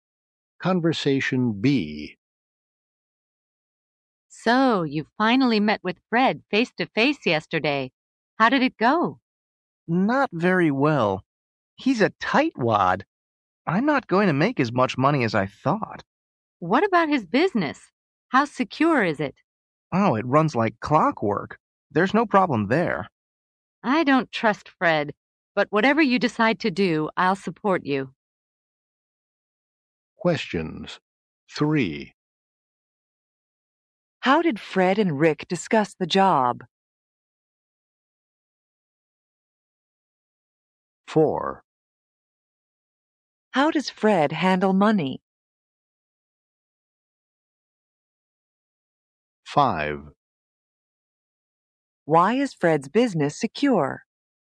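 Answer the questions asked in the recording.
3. Face to face, in person.
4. He's a tightwad; he doesn't like to spend money.
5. It runs like clockwork.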